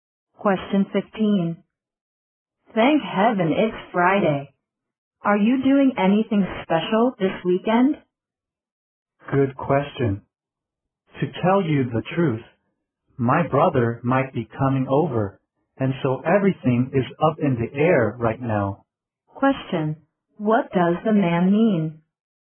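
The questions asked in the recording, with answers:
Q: What does the man mean?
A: His weekend plans are uncertain.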